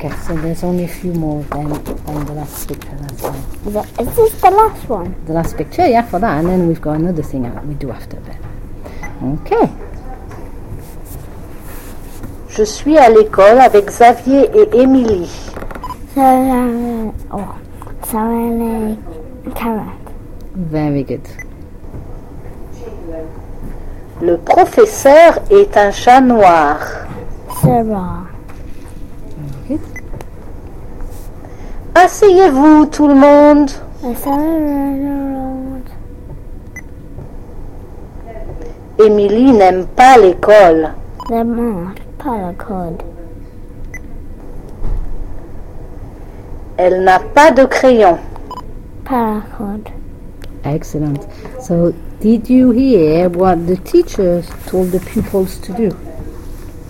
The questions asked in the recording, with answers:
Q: So, did you hear what the teachers told the pupils to do?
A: Sit down.